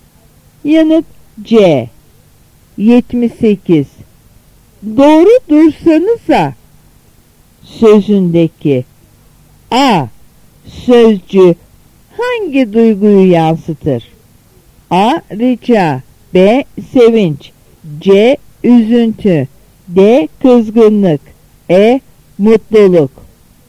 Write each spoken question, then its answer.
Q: Sözündeki A. Sözcü hangi duyguyu yansıtır?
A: Yanıt D.